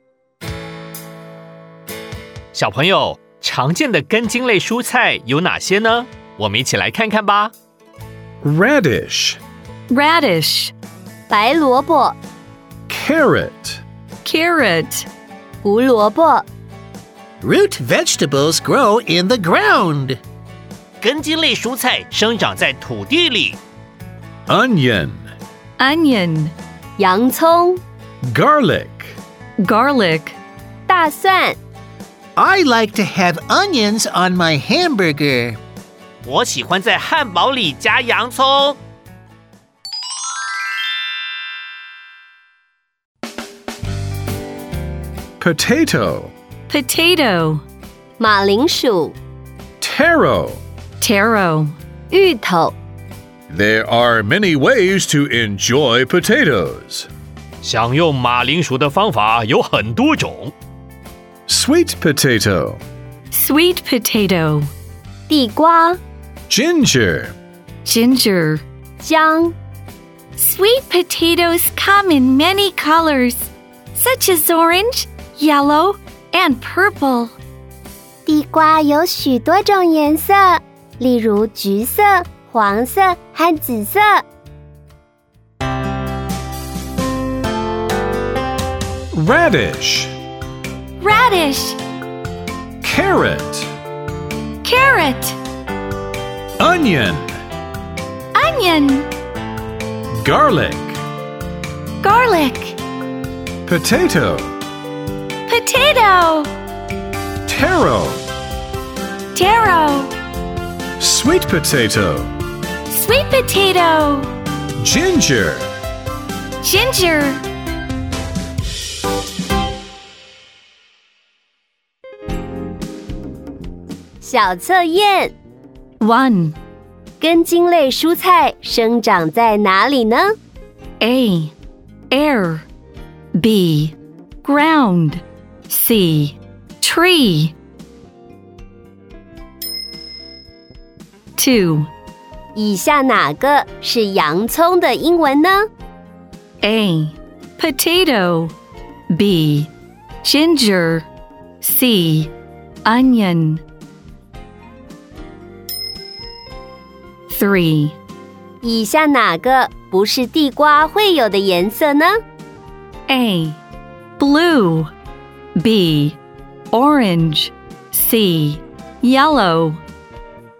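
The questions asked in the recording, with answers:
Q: 根茎类蔬菜生长在哪里呢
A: B: Ground

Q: 以下哪个是洋葱的英文呢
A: C: Onion

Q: 以下哪个不是地瓜会有的颜色呢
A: A: Blue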